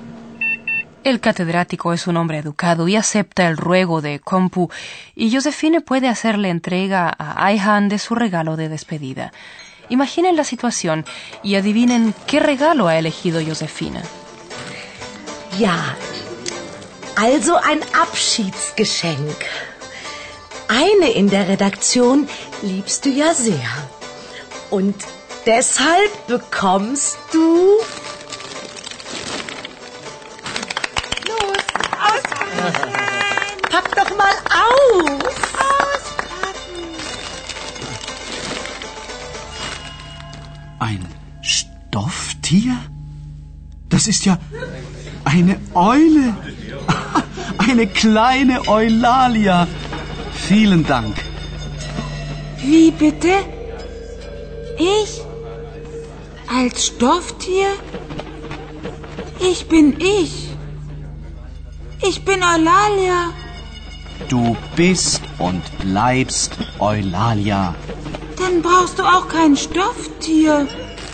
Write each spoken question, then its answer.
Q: Imaginen la situación y adivinen qué regalo ha elegido Josefine.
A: Probablemente hayan entendido que el regalo es una pequeña lechuza.